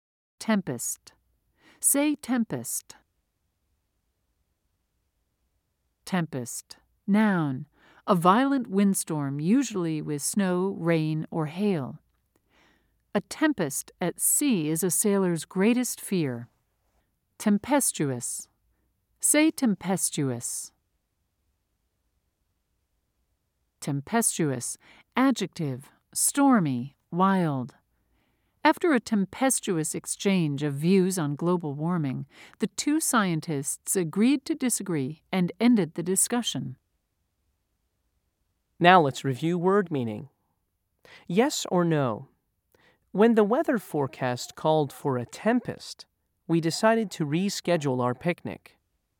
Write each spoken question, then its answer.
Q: Yes or no? When the weather forecast called for a tempest, we decided to reschedule our picnic.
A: If you said yes, you are correct.